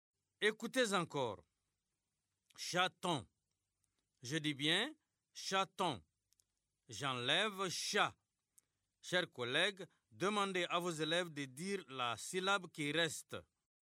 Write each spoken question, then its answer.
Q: J'enlève chat. Chers collègues, demandez à vos élèves de dire la syllabe qui reste.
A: Il reste ton.